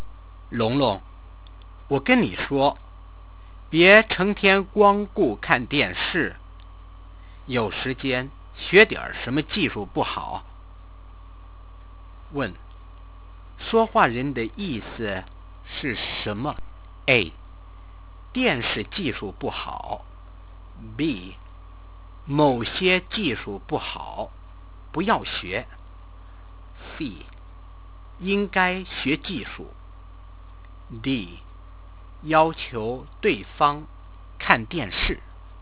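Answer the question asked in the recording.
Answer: C: 应该学技术。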